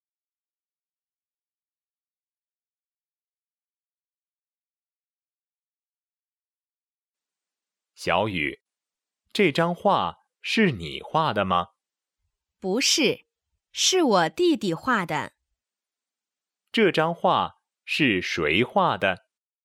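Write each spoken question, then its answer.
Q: 这张画是谁画的?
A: 弟弟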